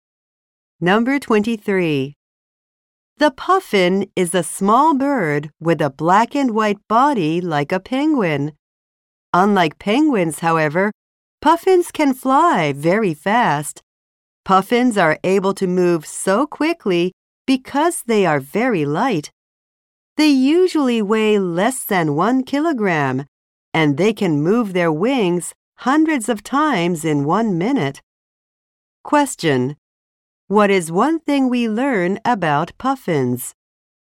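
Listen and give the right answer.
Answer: They can fly very fast because they are very light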